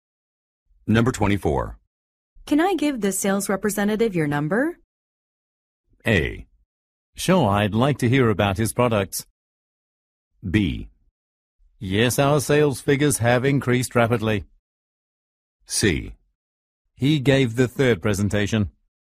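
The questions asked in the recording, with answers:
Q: Can I give the sales representative your number?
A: A: Sure, I'd like to hear about his products.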